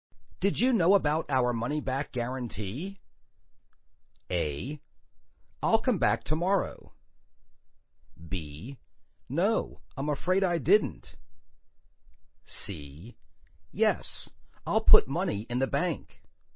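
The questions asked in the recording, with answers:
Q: Did you know about our money-back guarantee?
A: B: No, I'm afraid I didn't.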